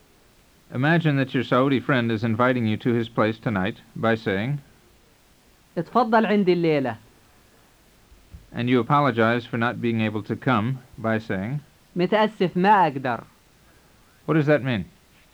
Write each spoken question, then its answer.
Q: What does that mean?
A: It means, sorry, I can't.